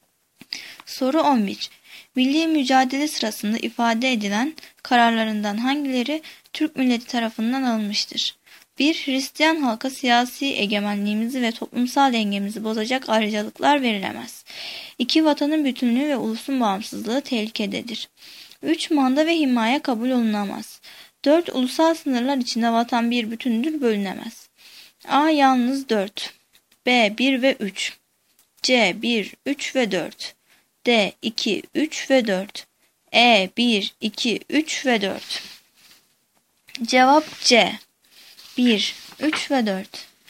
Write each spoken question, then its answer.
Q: Milli mücadele sırasında ifade edilen kararlarından hangileri Türk milleti tarafından alınmıştır?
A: Cevap C. 1, 3 ve 4.